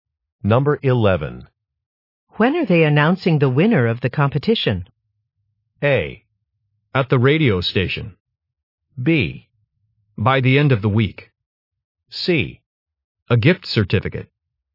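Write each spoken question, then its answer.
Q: When are they announcing the winner of the competition?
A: B: By the end of the week.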